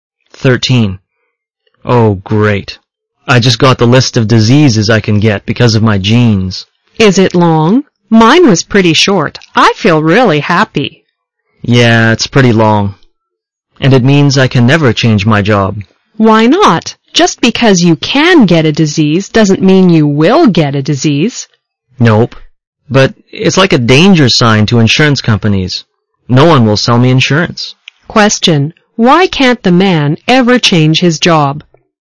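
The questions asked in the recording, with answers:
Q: Why can't the man ever change his job?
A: Because his long list of genetic disease risks means no insurance company will sell him insurance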